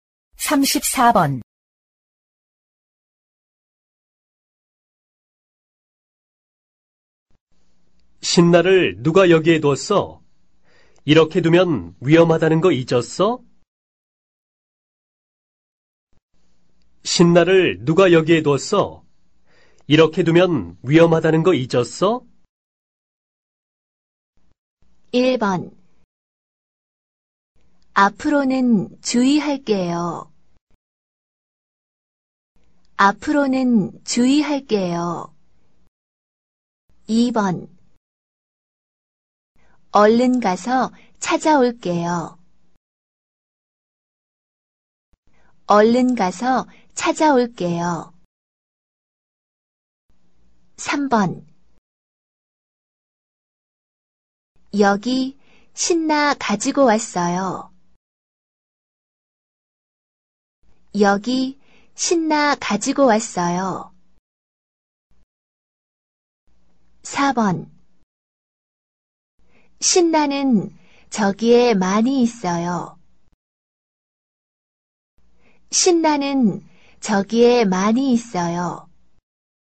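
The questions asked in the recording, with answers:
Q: 신나를 누가 여기에 뒀어? 이렇게 두면 위험하다는 거 잊었어?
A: 1: 앞으로는 주의할게요.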